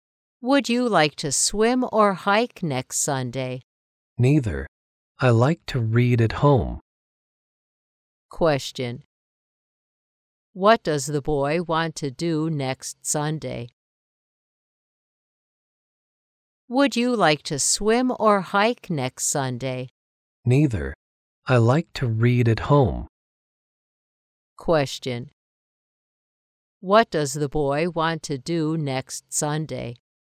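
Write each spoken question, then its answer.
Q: What does the boy want to do next Sunday?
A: Read at home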